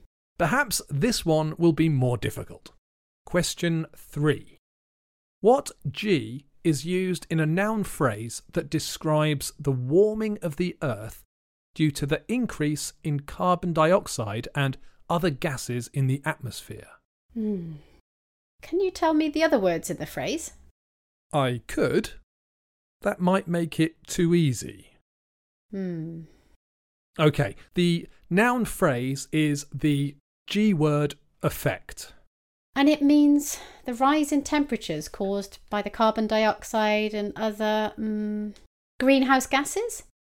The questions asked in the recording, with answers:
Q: What G is used in a noun phrase that describes the warming of the earth due to the increase in carbon dioxide and other gases in the atmosphere?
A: Ah, it's the greenhouse effect.